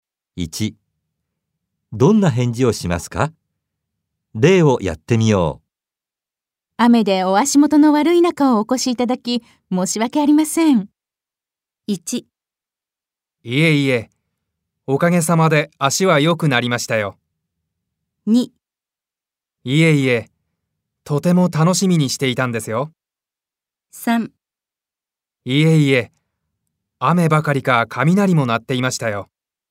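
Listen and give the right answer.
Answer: 2: いえいえ、とても楽しみにしていたんですよ。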